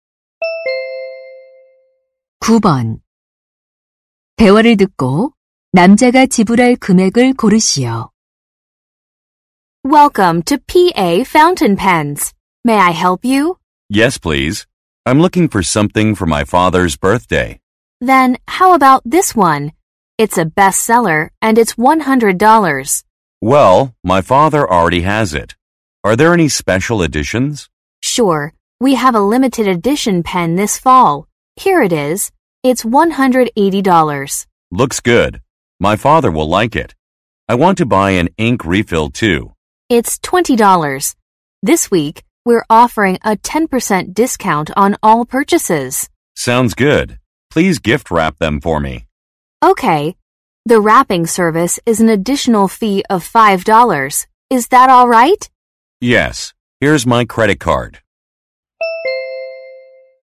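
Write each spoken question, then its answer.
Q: 대화를 듣고 남자가 지불할 금액을 고르시오.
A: 185달러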